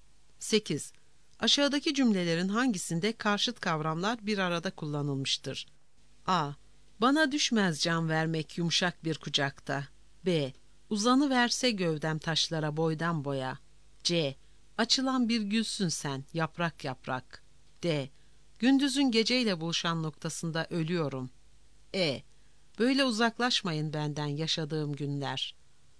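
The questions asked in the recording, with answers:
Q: Aşağıdaki cümlelerin hangisinde karşıt kavramlar bir arada kullanılmıştır?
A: D: Gündüzün geceyle buluşan noktasında ölüyorum.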